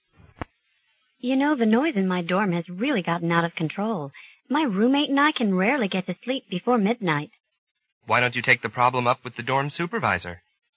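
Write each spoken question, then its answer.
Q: What does the man suggest the woman do?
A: Talk to the dorm supervisor about the noise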